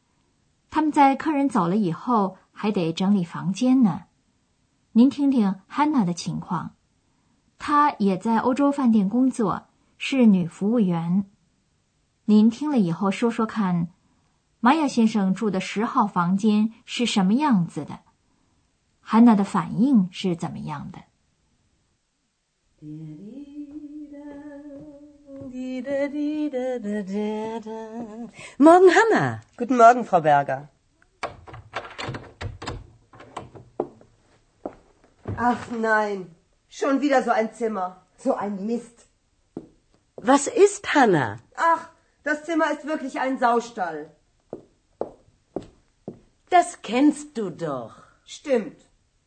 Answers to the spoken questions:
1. Hannah 觉得这个房间就像一个猪圈
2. 这让她非常的生气,她就骂起来了